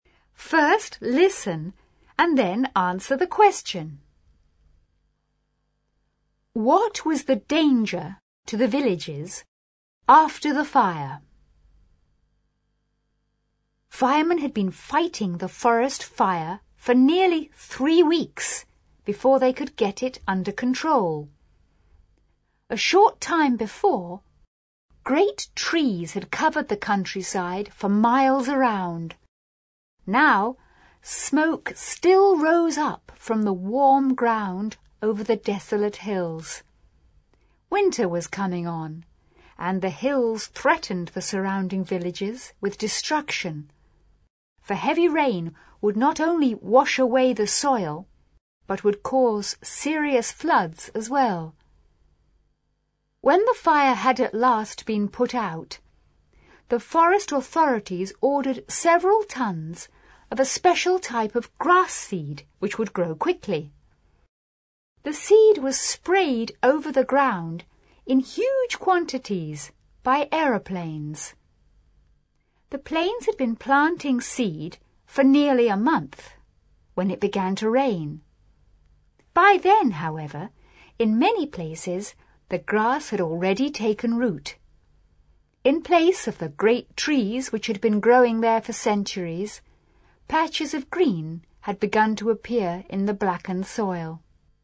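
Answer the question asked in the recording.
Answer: Heavy rain could wash away the soil and cause serious floods.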